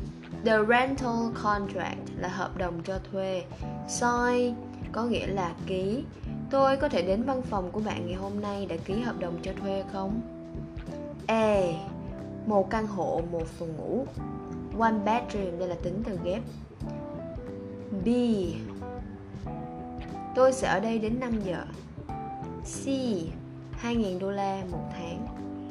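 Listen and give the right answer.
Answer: B: tôi sẽ ở đây đến 5 giờ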